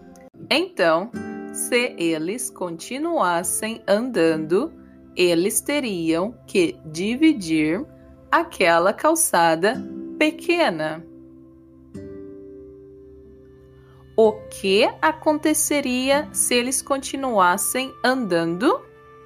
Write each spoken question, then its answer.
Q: O que aconteceria se eles continuassem andando?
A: Eles teriam que dividir aquela calçada pequena.